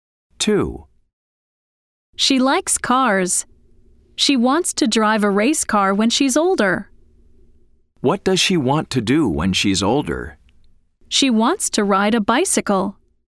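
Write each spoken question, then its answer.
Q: What does she want to do when she's older?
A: False: She wants to drive a race car.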